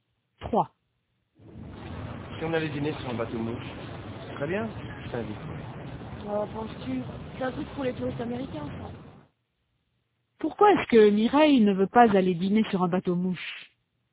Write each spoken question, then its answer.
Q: Pourquoi est-ce que Mireille ne veut pas aller dîner sur un bateau mouche?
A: Parce que c'est un truc pour les touristes américains.